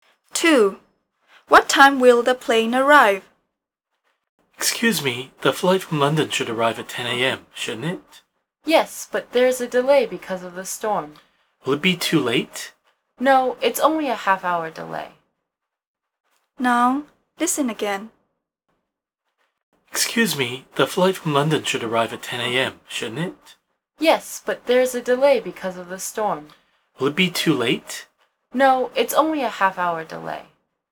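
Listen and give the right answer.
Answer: 10:30 a.m.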